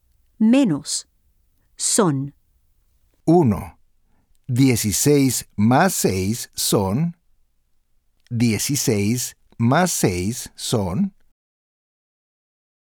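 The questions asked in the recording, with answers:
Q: 16 más 6 son.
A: 22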